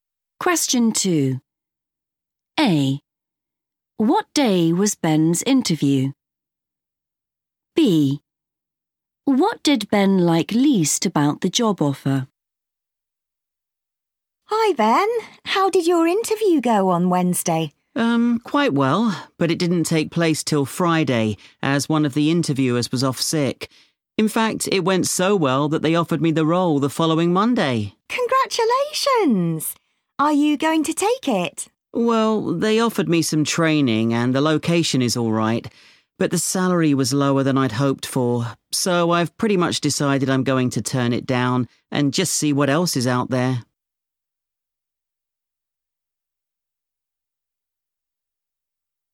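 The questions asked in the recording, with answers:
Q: What day was Ben's interview?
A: Friday

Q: What did Ben like least about the job offer?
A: the salary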